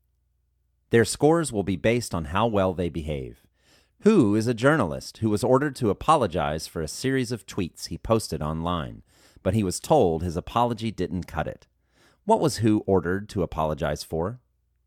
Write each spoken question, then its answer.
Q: What was Hu ordered to apologize for?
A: Hu was ordered to apologize for a series of tweets he posted online.